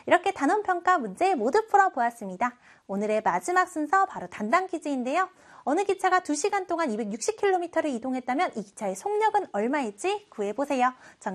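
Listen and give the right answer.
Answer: 130km/h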